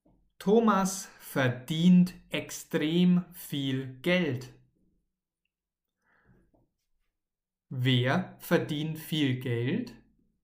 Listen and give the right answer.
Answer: Thomas, richtig. Thomas verdient viel Geld.